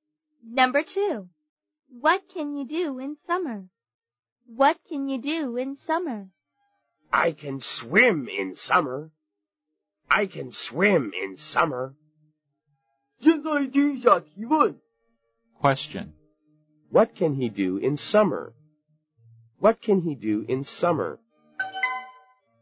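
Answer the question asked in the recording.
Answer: He can swim.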